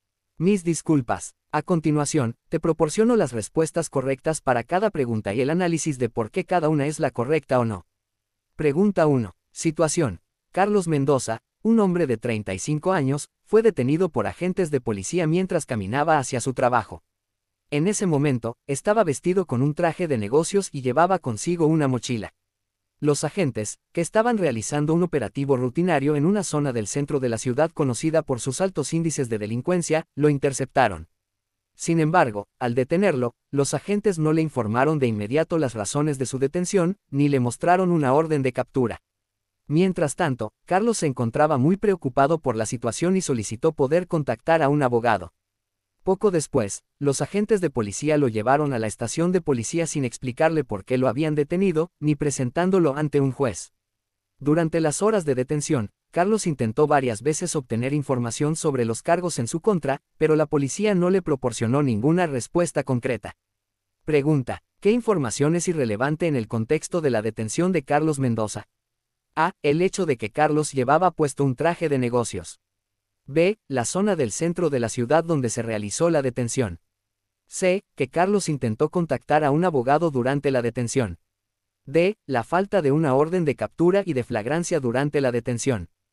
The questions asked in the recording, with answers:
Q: ¿qué información es irrelevante en el contexto de la detención de Carlos Mendoza?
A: Respuesta correcta. A. El hecho de que Carlos llevaba puesto un traje de negocios.